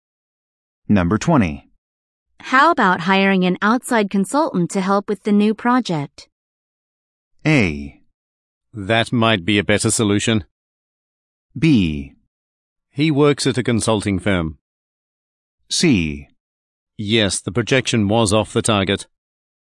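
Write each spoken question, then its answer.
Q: How about hiring an outside consultant to help with the new project?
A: A: That might be a better solution.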